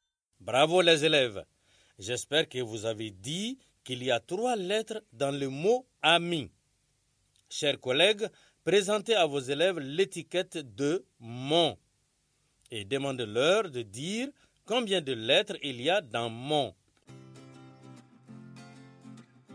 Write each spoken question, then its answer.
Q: demandez-leur de dire combien de lettres il y a dans « mon ».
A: J'espère que vous avez dit qu'il y a trois lettres dans le mot « mon ».